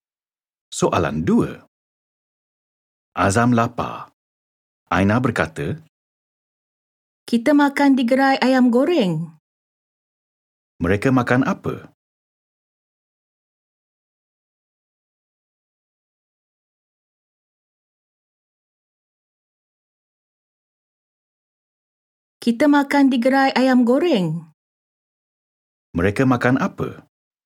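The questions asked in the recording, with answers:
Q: Mereka makan apa?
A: Ayam goreng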